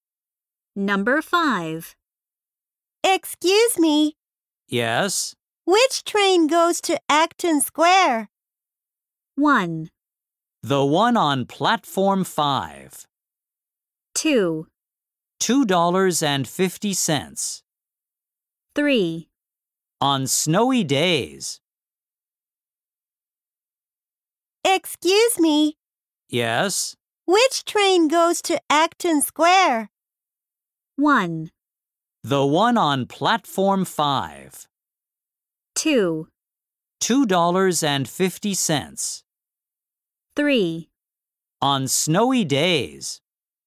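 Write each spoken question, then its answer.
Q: Which train goes to Acton Square?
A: 1: The one on Platform 5.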